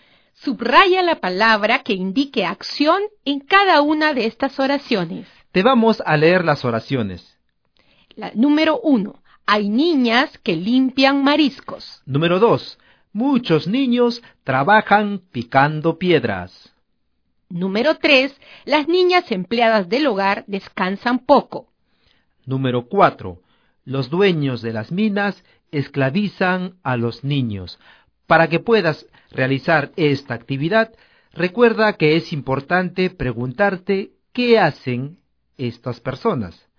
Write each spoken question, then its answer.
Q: Hay niñas que limpian mariscos.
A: limpian

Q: Muchos niños trabajan picando piedras.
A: trabajan

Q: Las niñas empleadas del hogar descansan poco.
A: descansan

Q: Los dueños de las minas esclavizan a los niños.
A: esclavizan